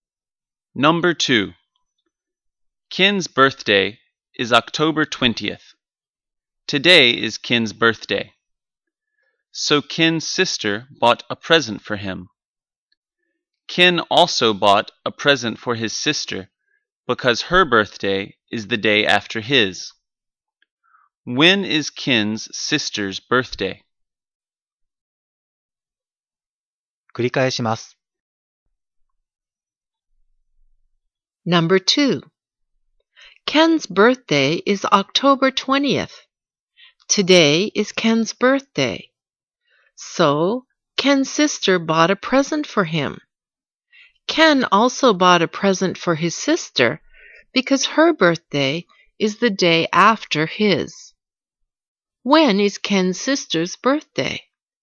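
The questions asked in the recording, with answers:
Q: When is Ken's sister's birthday?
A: October 21st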